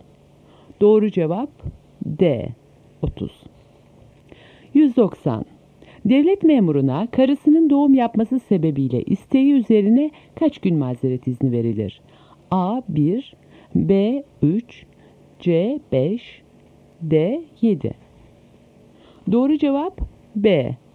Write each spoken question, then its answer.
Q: Devlet memuruna karısının doğum yapması sebebiyle isteği üzerine kaç gün mazeret izni verilir?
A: Doğru cevap B.